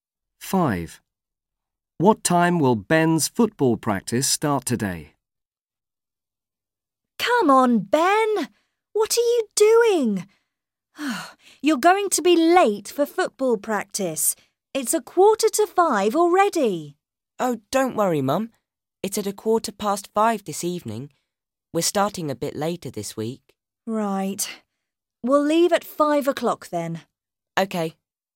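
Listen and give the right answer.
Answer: 5:15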